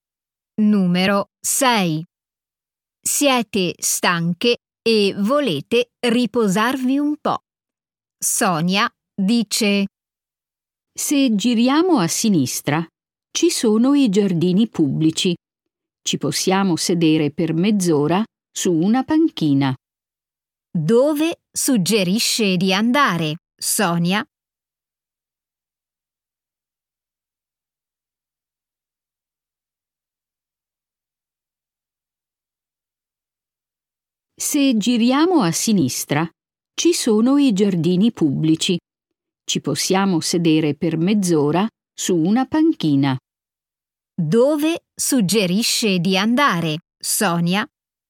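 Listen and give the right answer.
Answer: ai giardini pubblici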